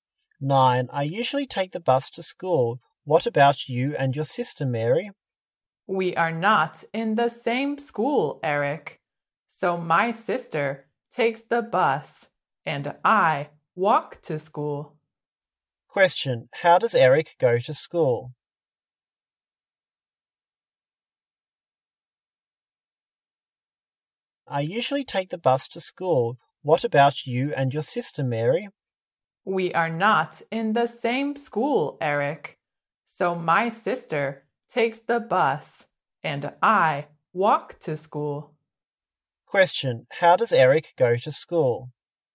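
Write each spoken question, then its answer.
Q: How does Eric go to school?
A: By bus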